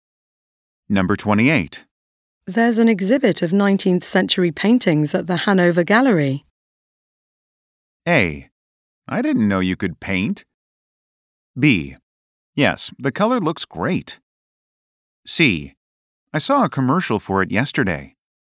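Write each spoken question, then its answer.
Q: There's an exhibit of 19th century paintings at the Hanover Gallery.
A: C: I saw a commercial for it yesterday.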